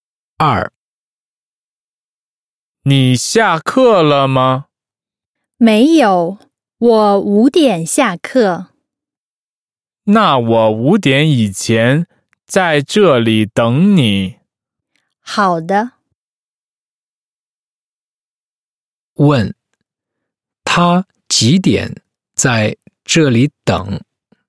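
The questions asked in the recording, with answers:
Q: 他几点在这里等?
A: 五点以前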